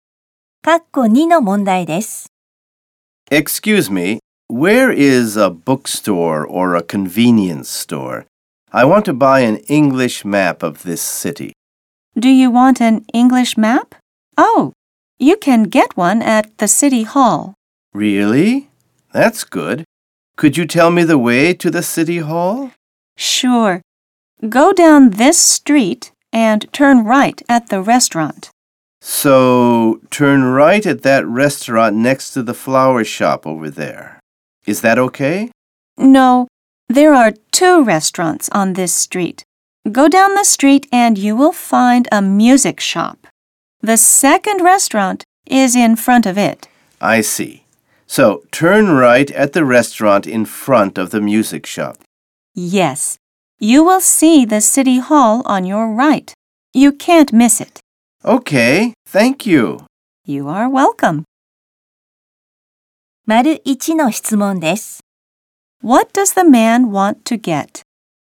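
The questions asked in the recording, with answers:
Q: What does the man want to get?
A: An English map of the city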